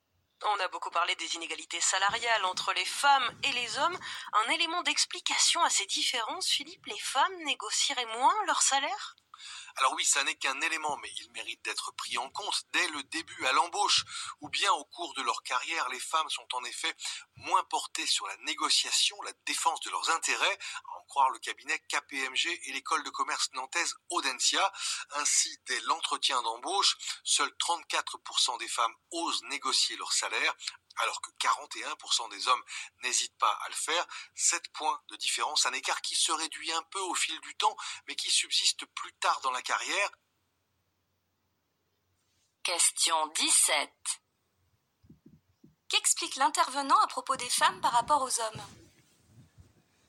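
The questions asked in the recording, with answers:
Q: Qu'explique l'intervenant à propos des femmes par rapport aux hommes ?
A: Elles négocient moins leur salaire que les hommes (34 % contre 41 % à l'embauche).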